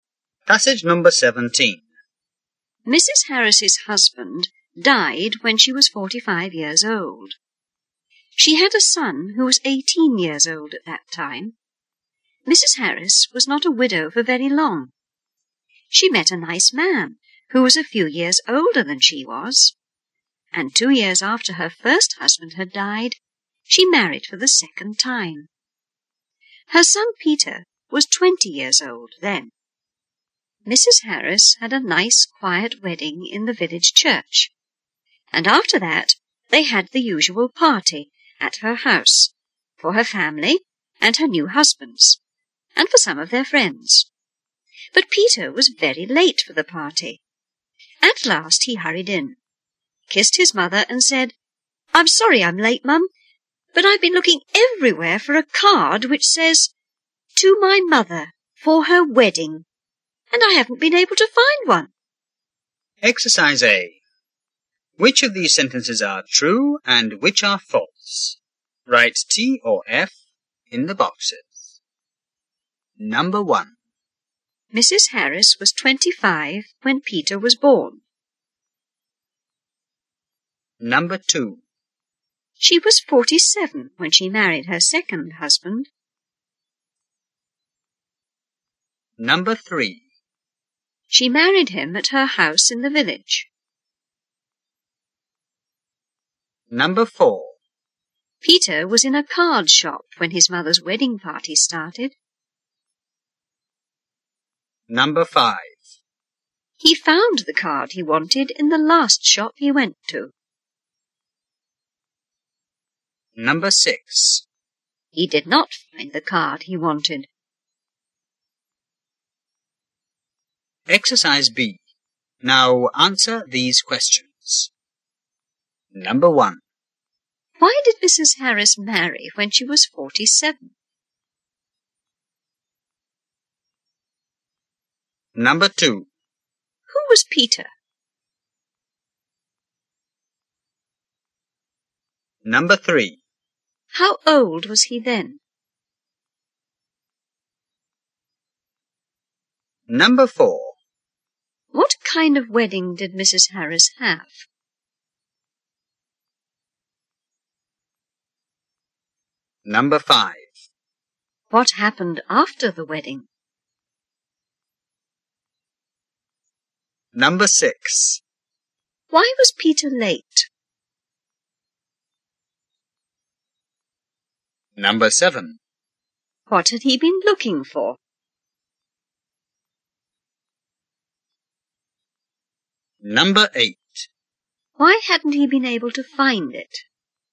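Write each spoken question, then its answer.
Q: Why did Mrs. Harris marry when she was 47?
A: Her first husband had died and she met a nice man

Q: Who was Peter?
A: Mrs. Harris's son

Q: How old was he then?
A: 20

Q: What kind of wedding did Mrs.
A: A nice, quiet wedding in the village church

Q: What happened after the wedding?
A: They had a party at her house for family and friends

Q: Why was Peter late?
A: He had been looking everywhere for a card

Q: What had he been looking for?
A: A card saying 'To my mother, for her wedding'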